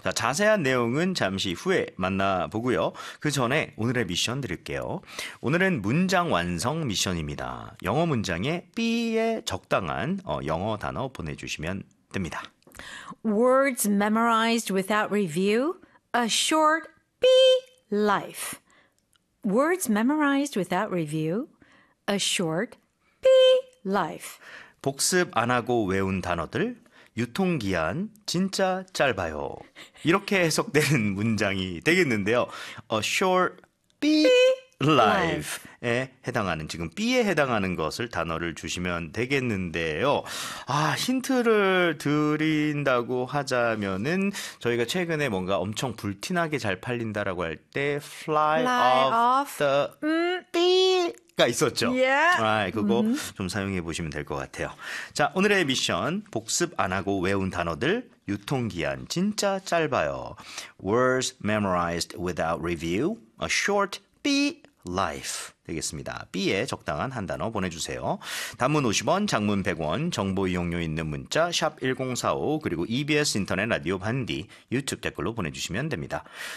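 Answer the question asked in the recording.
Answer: shelf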